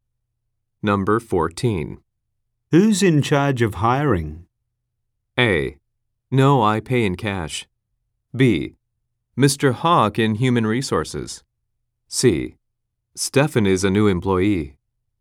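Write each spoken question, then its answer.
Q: Who's in charge of hiring?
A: B: Mr. Hawk in Human Resources.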